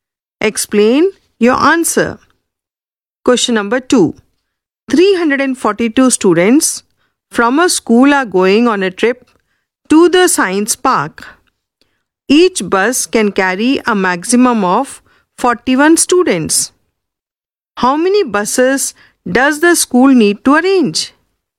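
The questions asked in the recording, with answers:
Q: How many buses does the school need to arrange?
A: 9 buses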